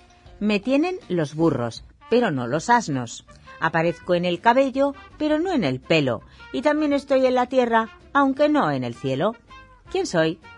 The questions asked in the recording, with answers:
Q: ¿Quién soy?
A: Solución. Una consonante doble como las que contienen las palabras burro, cabello o tierra.